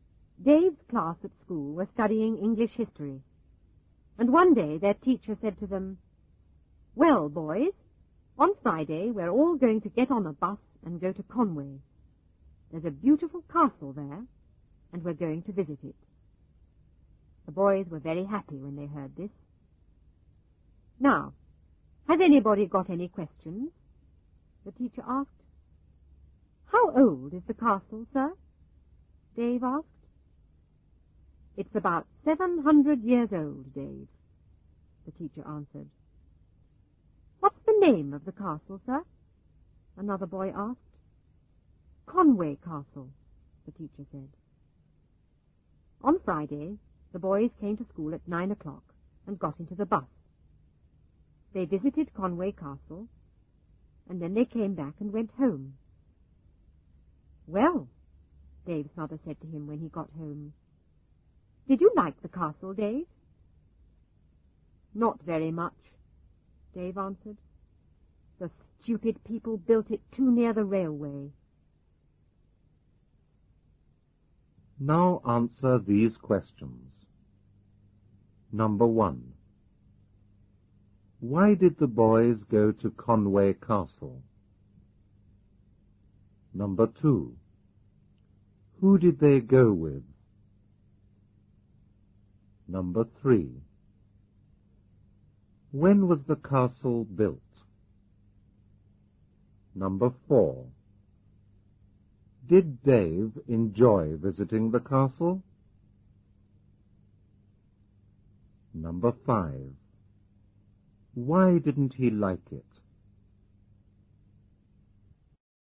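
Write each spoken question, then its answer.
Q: Why did the boys go to Conway Castle?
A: They were studying English history, and their teacher took them to visit the castle

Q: Who did they go with?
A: Their teacher and classmates

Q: When was the castle built?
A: About 700 years ago

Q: Did Dave enjoy visiting the castle?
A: No, not very much

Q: Why didn't he like it?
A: He thought it was built too near the railway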